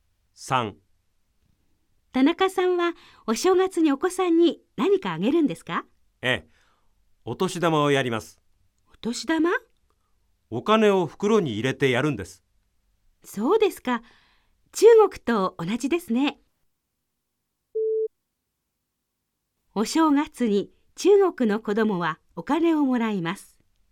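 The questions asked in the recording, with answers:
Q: お正月に中国の子供はお金をもらいます。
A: ○(正しい)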